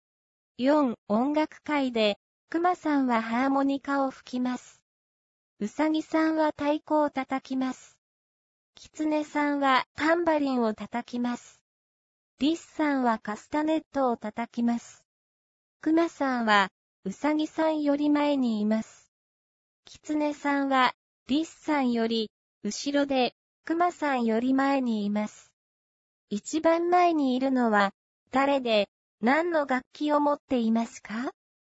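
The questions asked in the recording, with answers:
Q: 一番前にいるのは誰で、何の楽器を持っていますか?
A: リスさん、カスタネット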